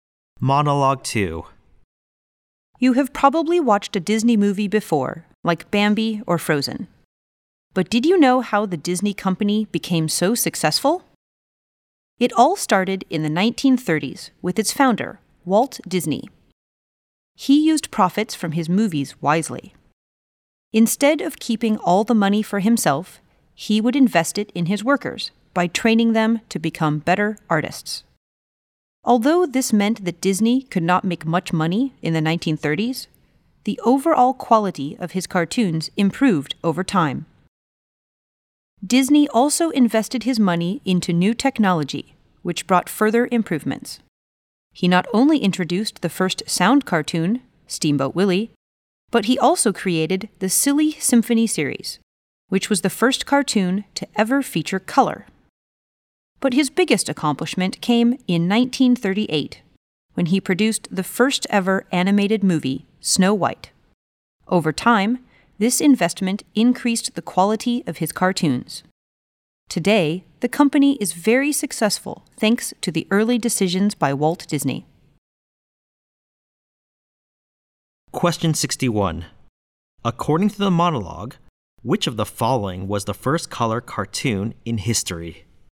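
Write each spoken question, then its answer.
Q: According to the monologue, which of the following was the first color cartoon in history?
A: Silly Symphony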